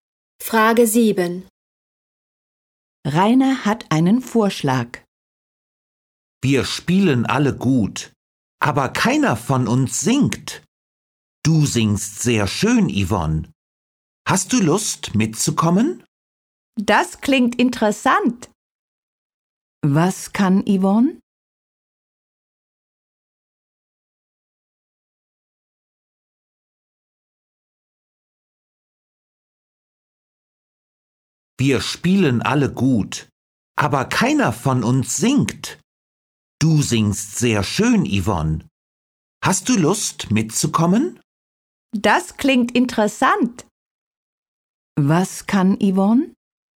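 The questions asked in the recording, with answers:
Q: Was kann Yvonne?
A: Sehr schön singen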